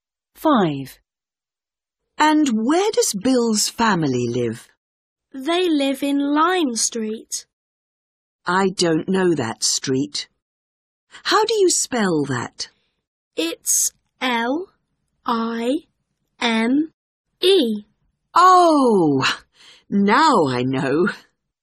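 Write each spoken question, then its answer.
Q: And where does Bill's family live?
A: Lime Street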